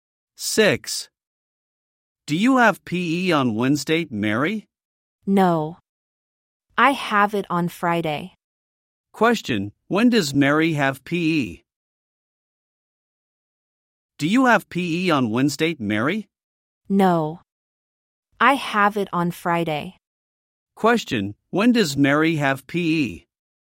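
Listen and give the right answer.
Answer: On Friday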